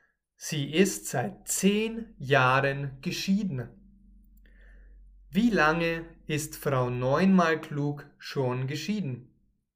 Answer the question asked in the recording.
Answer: Seit zehn Jahren. Sie ist seit zehn Jahren geschieden.